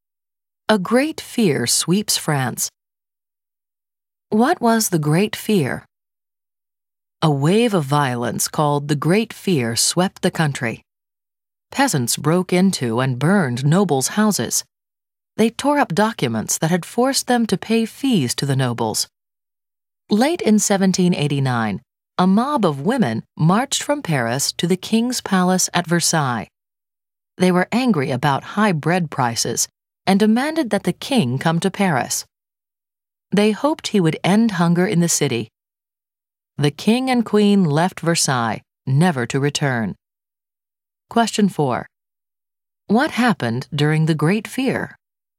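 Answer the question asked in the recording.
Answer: Peasants broke into and burned nobles' houses and tore up the documents that made them pay fees to the nobles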